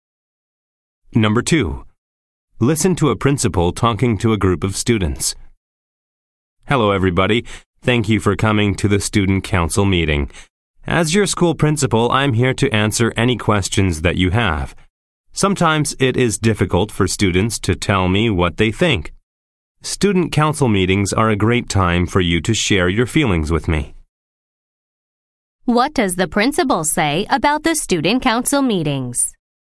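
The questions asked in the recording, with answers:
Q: What does the principal say about the student council meetings?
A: They are a great time for students to share their feelings with the principal.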